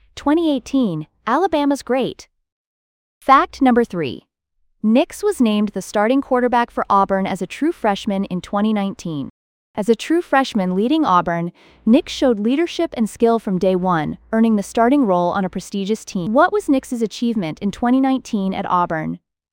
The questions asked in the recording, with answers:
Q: What was Nix's achievement in 2019 at Auburn?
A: named starting quarterback as a true freshman.